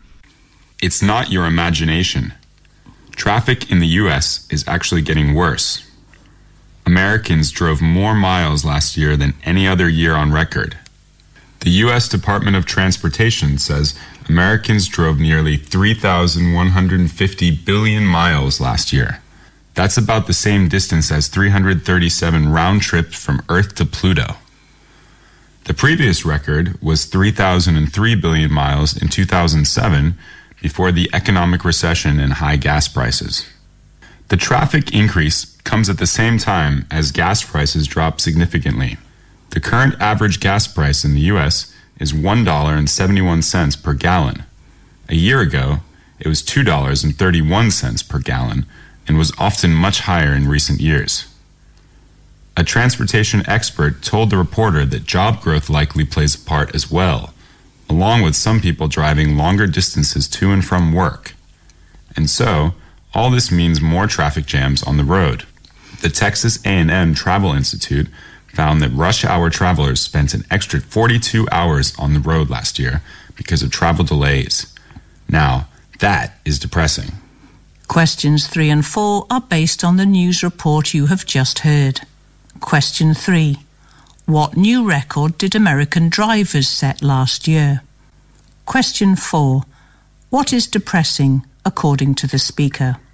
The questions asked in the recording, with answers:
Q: What new record did American drivers set last year?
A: Americans drove more miles last year than any other year on record.

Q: What is depressing, according to the speaker?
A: What is depressing is the extra hours.